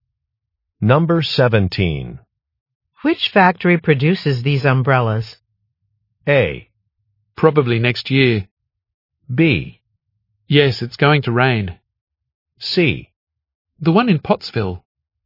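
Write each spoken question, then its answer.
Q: Which factory produces these umbrellas?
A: C: The one in Pottsville.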